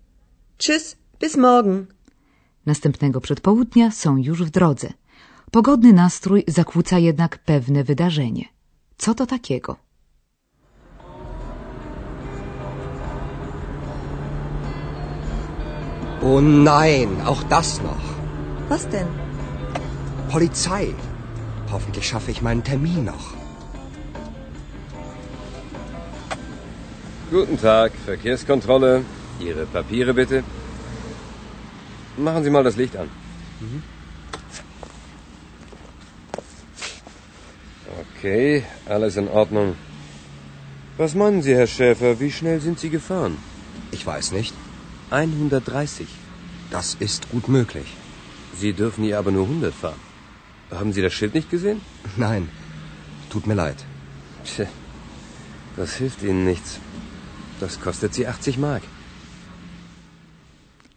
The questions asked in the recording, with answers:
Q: Co to takiego?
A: Jak zapewne odgadli Państwo bez trudu, Andreas musiał zapłacić mandat za przekroczenie szybkości na autostradzie.